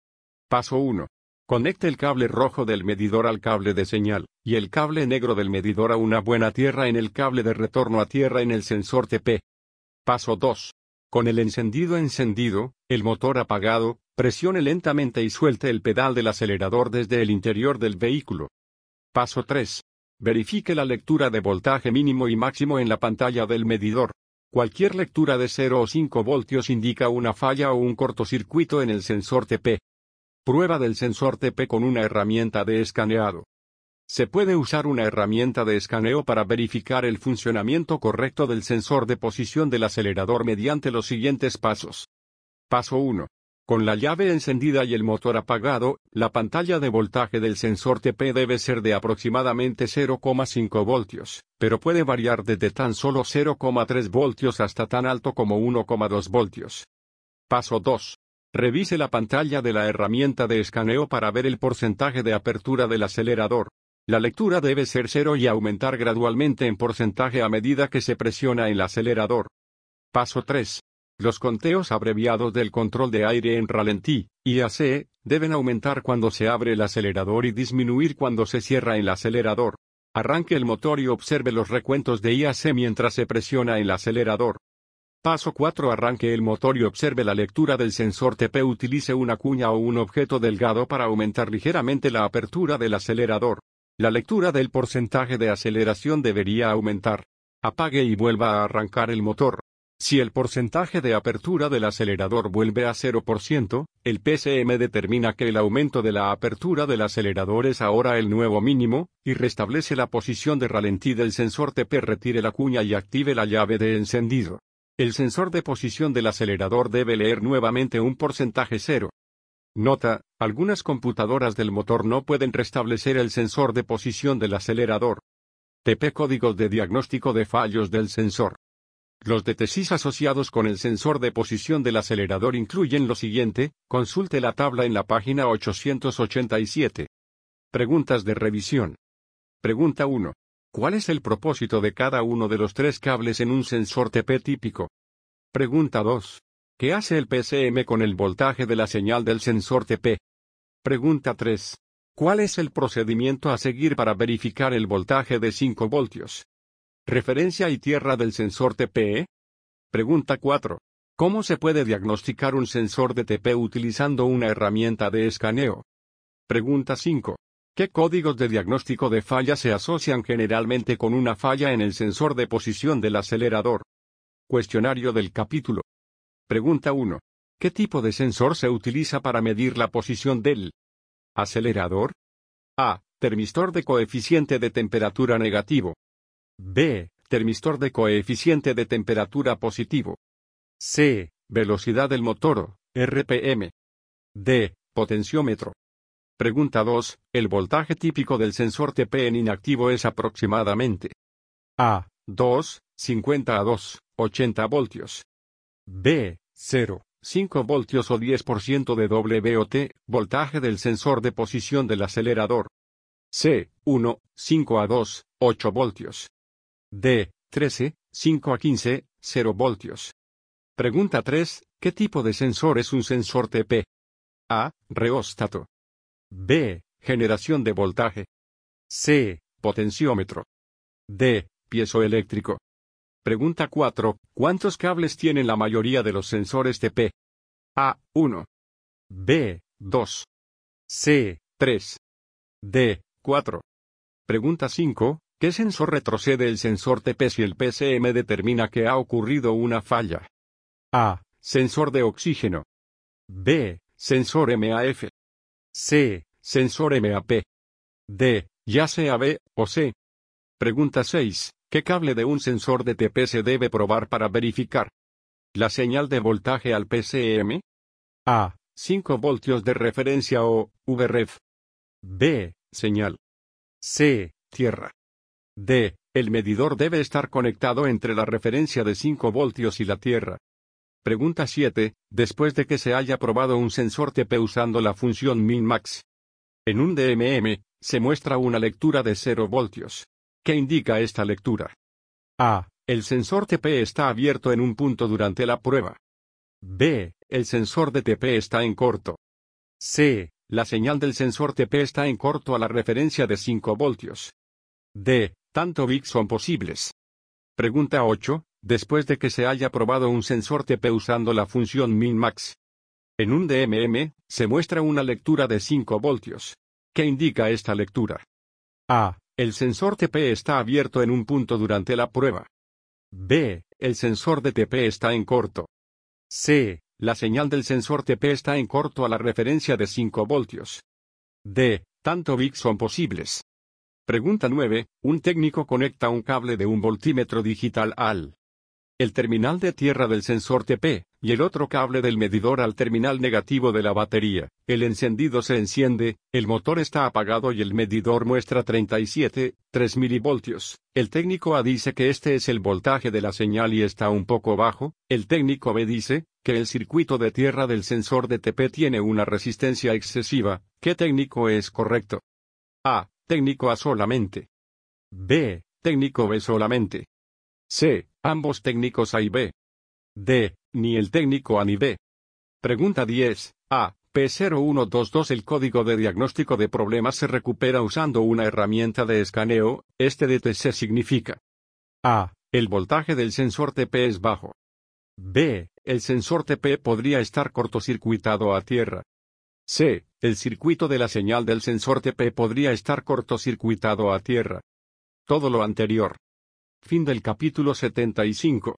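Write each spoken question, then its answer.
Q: ¿El voltaje típico del sensor TP en inactivo es aproximadamente?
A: B: 0, 5 voltios o 10% de WOT, voltaje del sensor de posición del acelerador

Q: ¿Cuántos cables tienen la mayoría de los sensores TP?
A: C: 3

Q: ¿Qué cable de un sensor de TP se debe probar para verificar la señal de voltaje al PCM?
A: B: Señal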